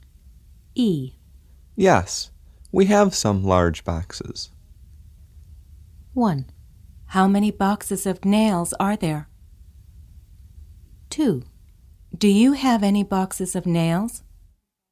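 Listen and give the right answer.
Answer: 2: Do you have any boxes of nails?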